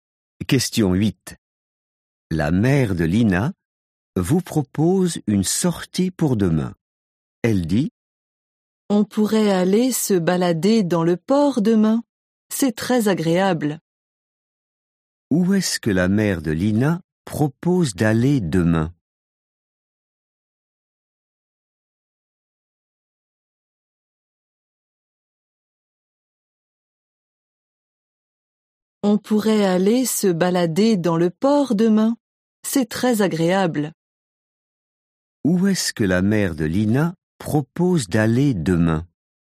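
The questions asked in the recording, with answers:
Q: Où est-ce que la mère de Lina propose d'aller demain?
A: au port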